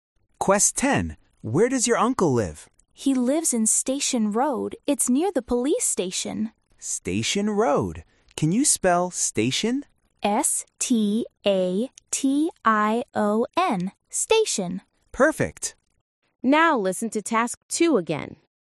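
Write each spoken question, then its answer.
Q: Where does your uncle live?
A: Station Road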